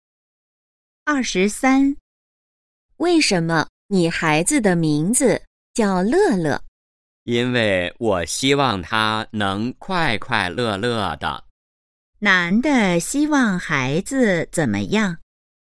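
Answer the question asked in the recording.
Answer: 快快乐乐的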